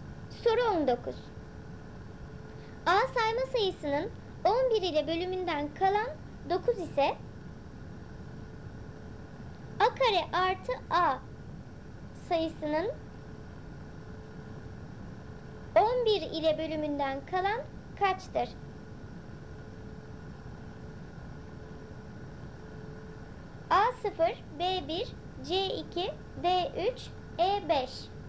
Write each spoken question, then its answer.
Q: 11 ile bölümünden kalan kaçtır?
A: Doğru cevap C2.